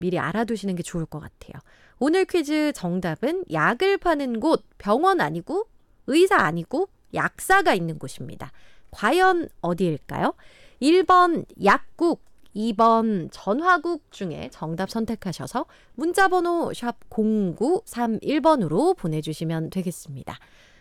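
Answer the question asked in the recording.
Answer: 1: 약국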